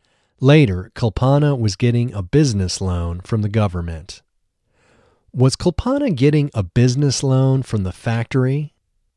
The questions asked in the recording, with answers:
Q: Was Kulpana getting a business loan from the factory?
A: No, she wasn't getting a business loan from the factory.